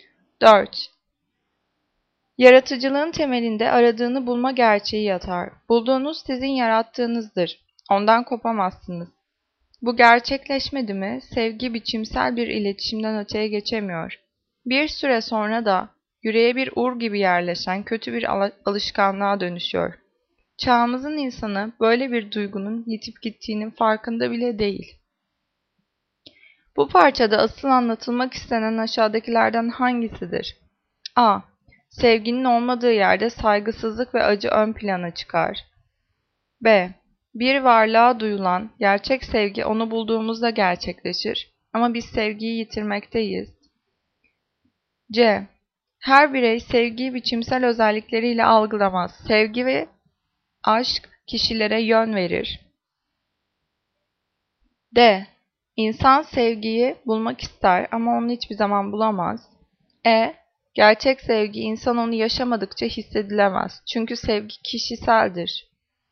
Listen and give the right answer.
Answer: Cevap B. Bir varlığa duyulan gerçek sevgi onu bulduğumuzda gerçekleşir.